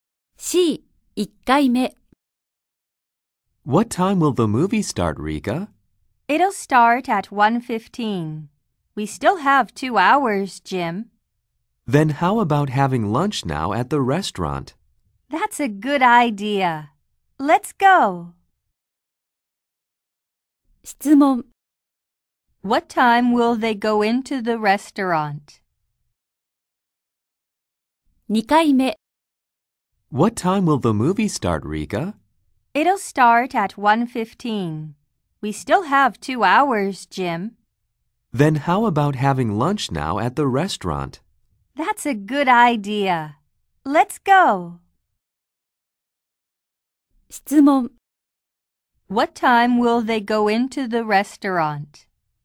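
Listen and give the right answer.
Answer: At 11:15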